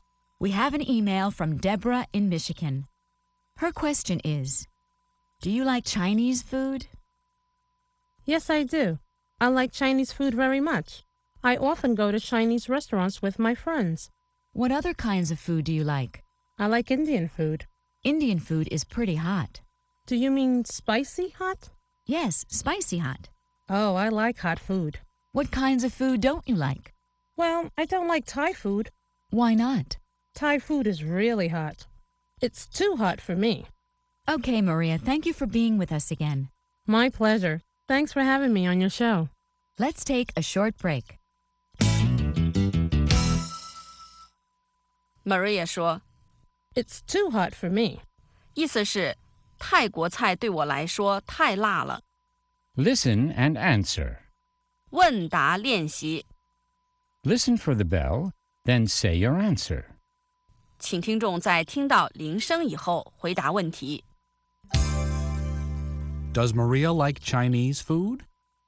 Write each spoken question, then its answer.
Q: Does Maria like Chinese food?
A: Yes, she does. She likes Chinese food.